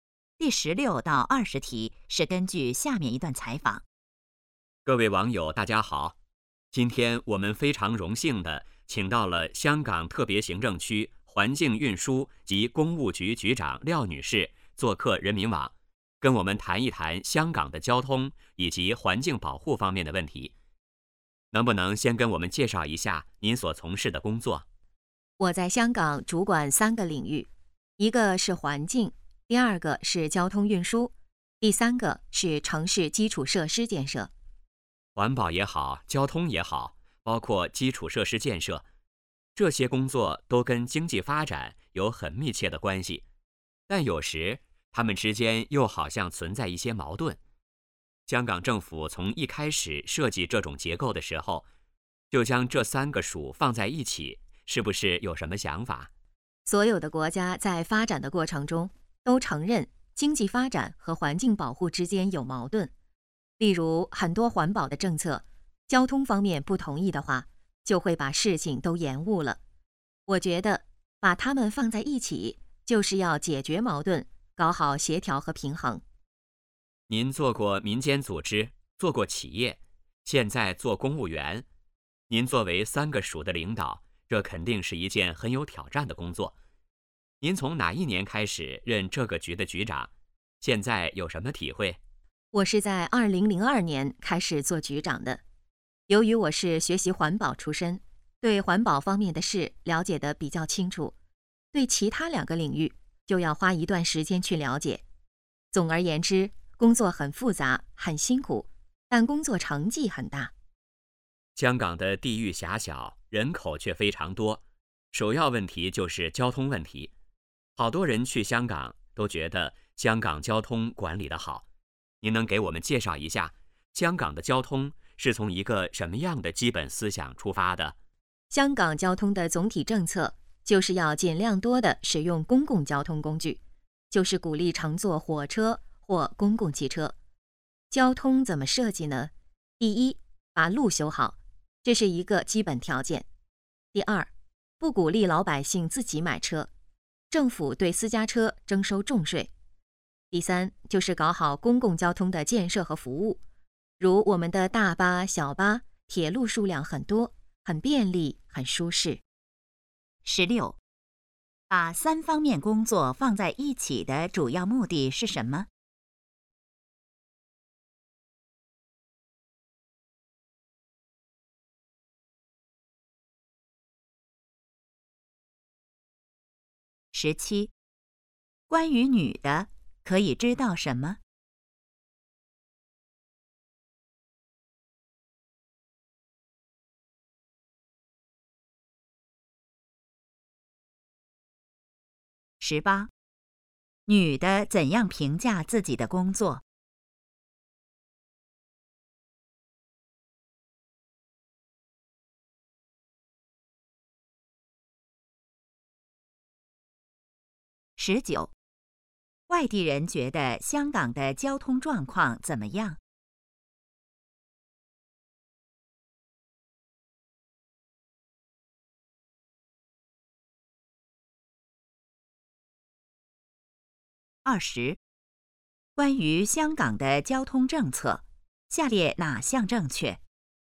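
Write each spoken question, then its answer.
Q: 把三方面工作放在一起的主要目的是什么?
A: 解决矛盾,搞好协调和平衡

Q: 女的怎样评价自己的工作?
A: 很复杂,很辛苦,但成绩很大

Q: 外地人觉得香港的交通状况怎么样?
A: 管理得好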